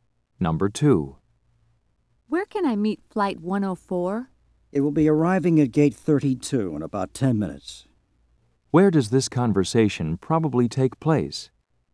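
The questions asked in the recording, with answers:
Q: Where does this conversation probably take place?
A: At an airport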